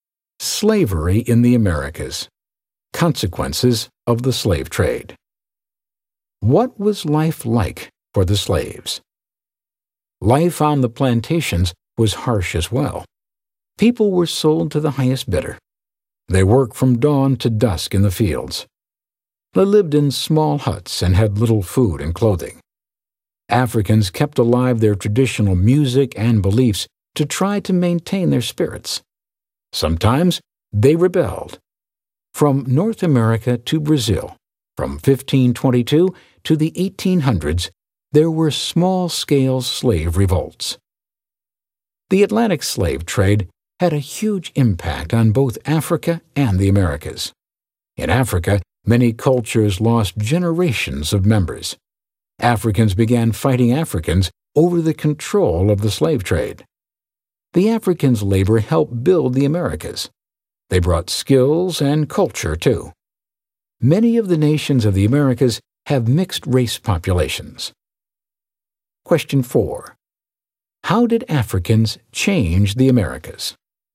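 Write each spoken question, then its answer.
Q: How did Africans change the Americas?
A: Their labor helped build the Americas, they brought skills and culture, and mixed-race populations resulted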